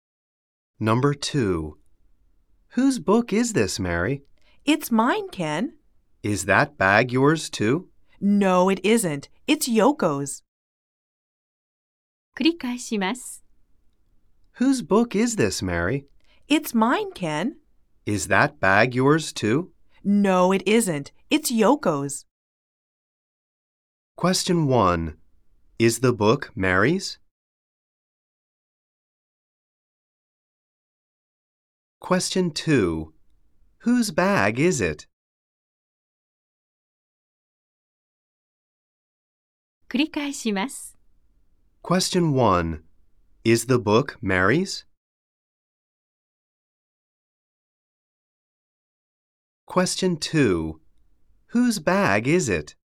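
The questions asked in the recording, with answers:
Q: Is the book Mary's?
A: Yes, it is.

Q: Whose bag is it?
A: It's Yoko's.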